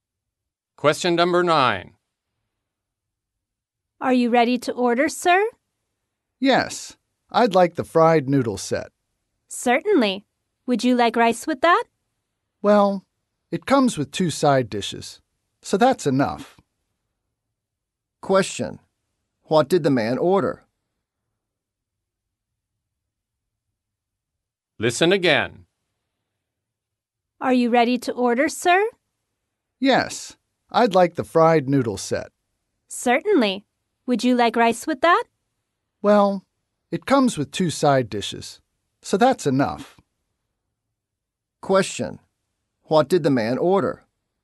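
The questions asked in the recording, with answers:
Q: What did the man order?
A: The fried noodle set, without rice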